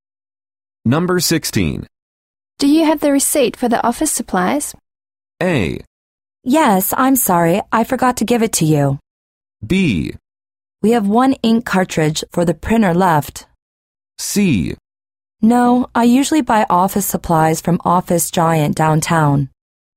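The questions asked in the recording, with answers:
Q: Do you have the receipt for the office supplies?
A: A: Yes, I'm sorry. I forgot to give it to you.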